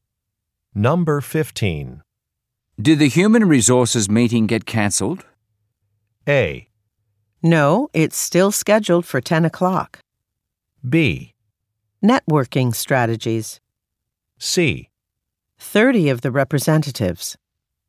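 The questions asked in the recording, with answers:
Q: Did the human resources meeting get cancelled?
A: A: No, it's still scheduled for 10 o'clock.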